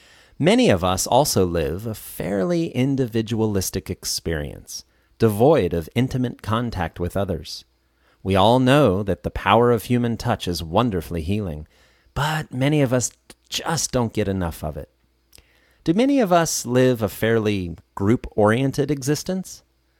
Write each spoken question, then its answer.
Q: Do many of us live a fairly group-oriented existence?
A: No, many of us live a fairly individualistic experience.